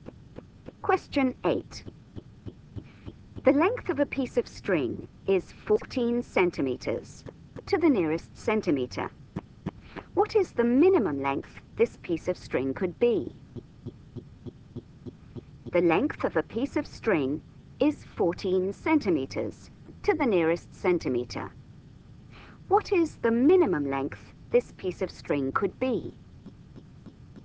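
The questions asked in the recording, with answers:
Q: What is the minimum length this piece of string could be?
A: 13.5 cm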